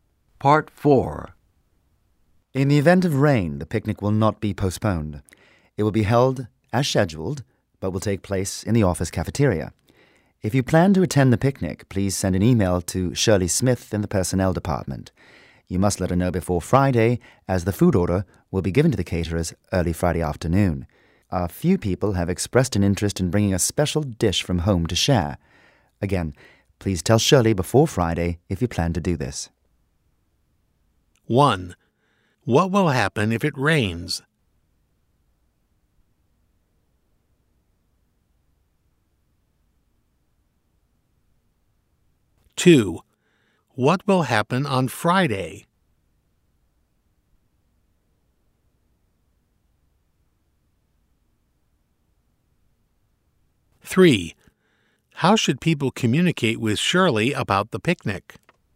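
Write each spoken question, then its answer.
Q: What will happen if it rains?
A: The picnic will be held in the office cafeteria

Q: What will happen on Friday?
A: The food order will be given to the caterers

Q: How should people communicate with Shirley about the picnic?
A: By email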